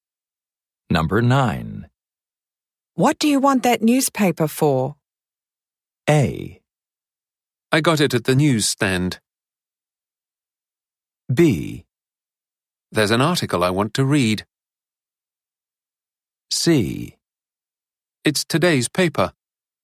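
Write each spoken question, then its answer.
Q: What do you want that newspaper for?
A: B: There's an article I want to read.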